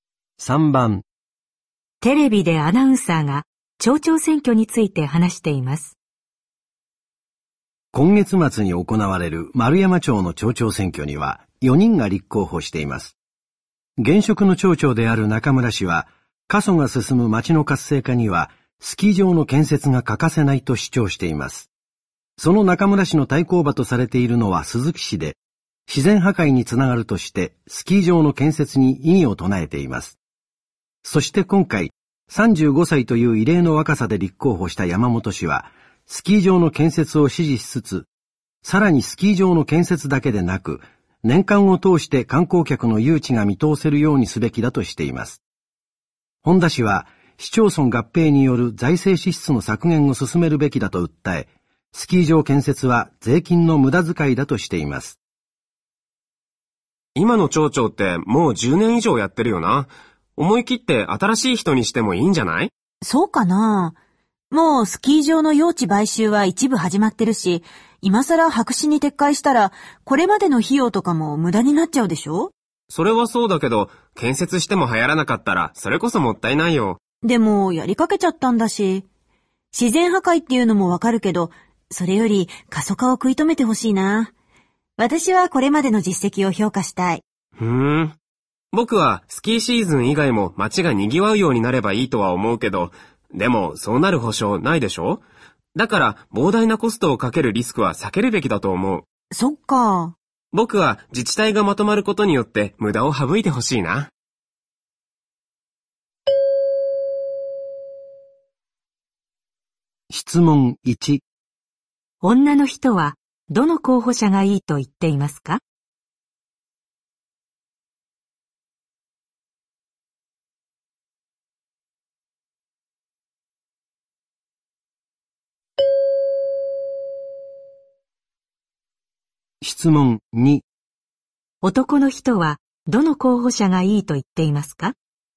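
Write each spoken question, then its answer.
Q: 女の人はどの候補者がいいと言っていますか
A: 中村氏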